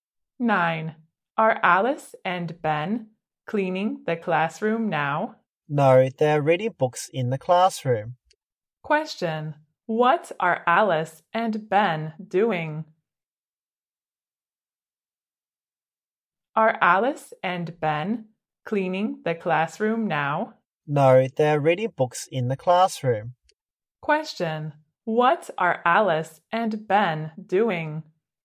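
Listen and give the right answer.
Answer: Reading books in the classroom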